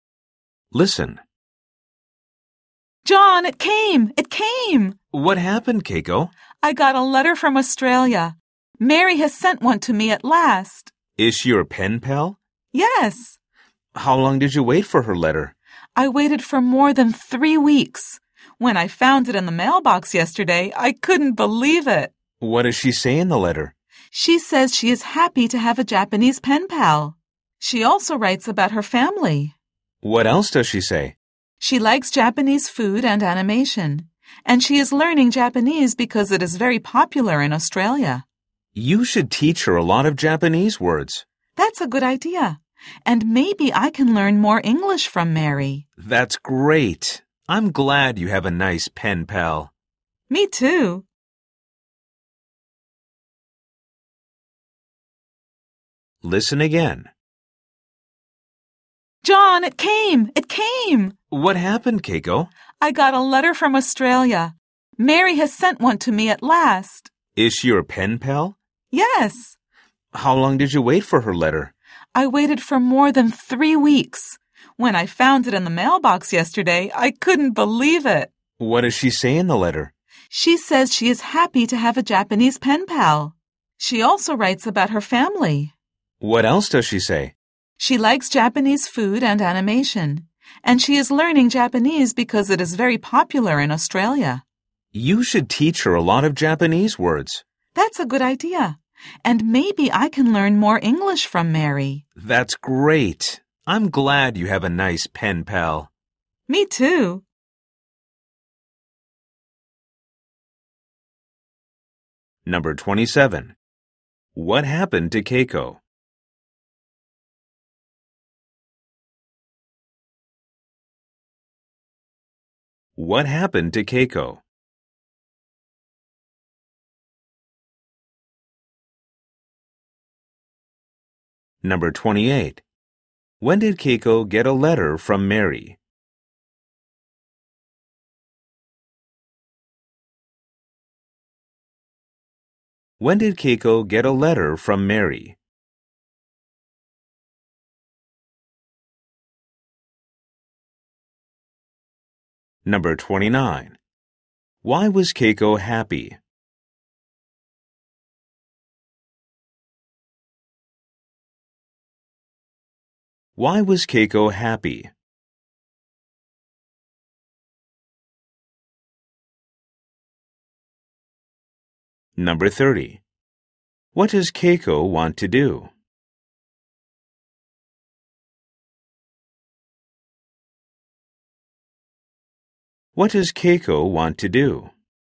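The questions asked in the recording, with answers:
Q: What happened to Keiko?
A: She got a letter from Australia.

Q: When did Keiko get a letter from Mary?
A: Yesterday.

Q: Why was Keiko happy?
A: Her pen pal Mary finally sent her a letter.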